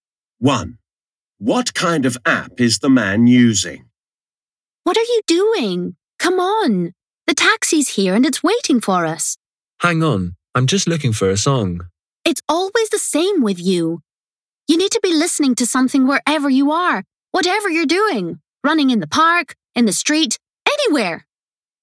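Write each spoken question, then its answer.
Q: What kind of app is the man using?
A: A music app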